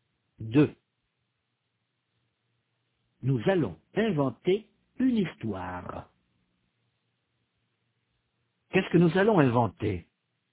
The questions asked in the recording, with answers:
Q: Qu'est-ce que nous allons inventer?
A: Une histoire.